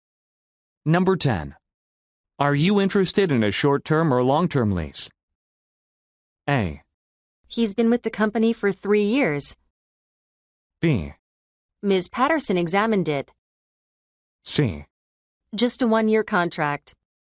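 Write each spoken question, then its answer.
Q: Are you interested in a short-term or long-term lease?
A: C: Just a 1-year contract.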